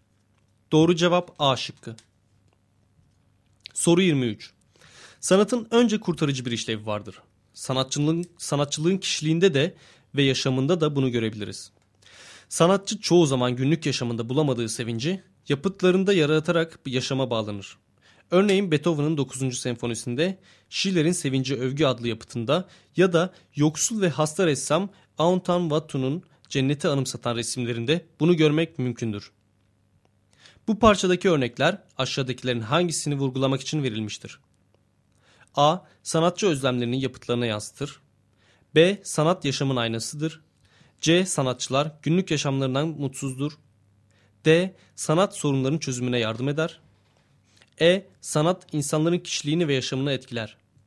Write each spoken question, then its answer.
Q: Bu parçadaki örnekler aşağıdakilerin hangisini vurgulamak için verilmiştir?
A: Doğru cevap A şıkkı.